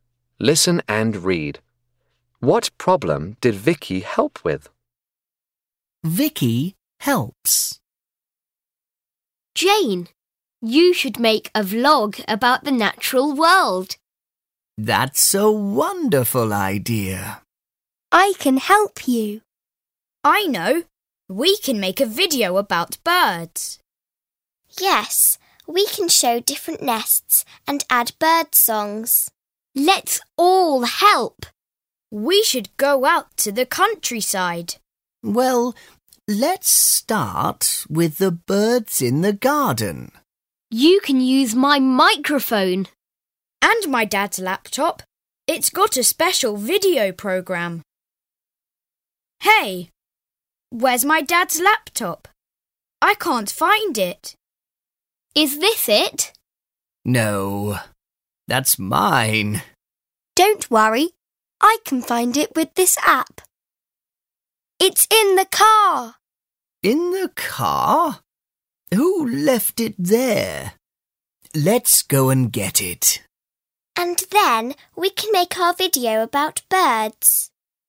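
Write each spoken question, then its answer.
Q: What problem did Vicky help with?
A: She found the missing laptop (with an app); it was in the car.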